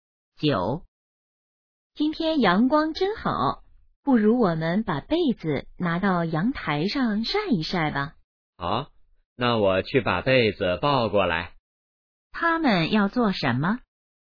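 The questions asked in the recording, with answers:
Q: 他们要做什么?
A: 晒被子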